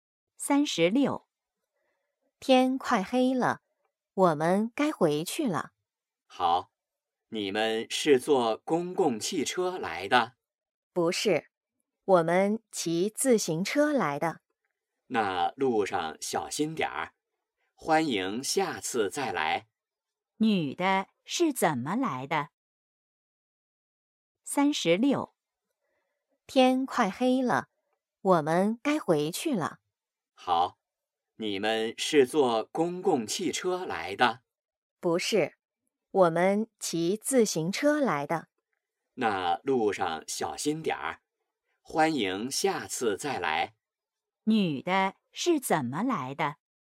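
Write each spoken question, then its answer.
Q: 女的是怎么来的?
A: 骑自行车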